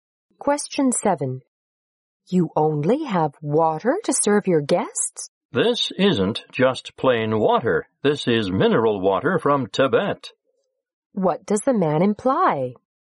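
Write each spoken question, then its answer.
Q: What does the man imply?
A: The water is special: mineral water from Tibet.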